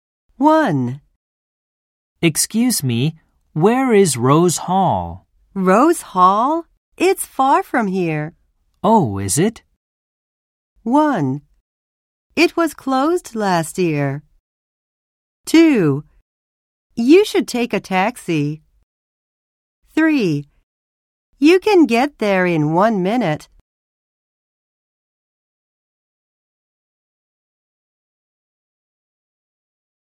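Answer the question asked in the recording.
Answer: 2: You should take a taxi.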